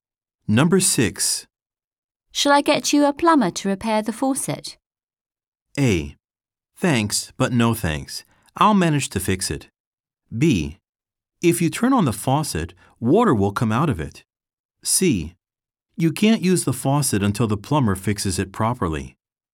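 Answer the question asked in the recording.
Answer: A: Thanks, but no thanks. I'll manage to fix it.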